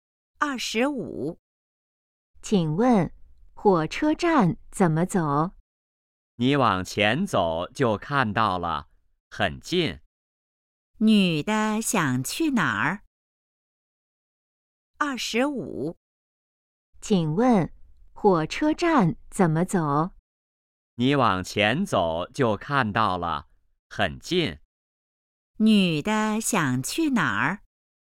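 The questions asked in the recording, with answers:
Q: 女的想去哪儿?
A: 火车站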